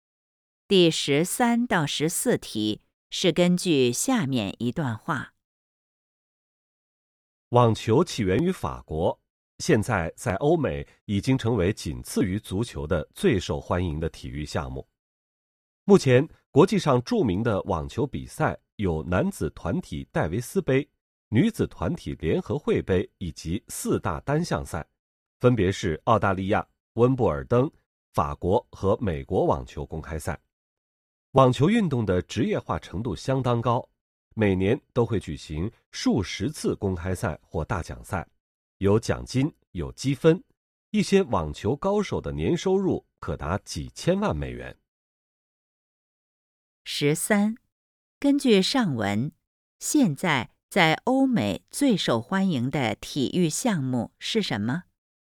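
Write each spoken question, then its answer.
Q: 根据上文,现在 在欧美最受欢迎的体育项目是什么?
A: 足球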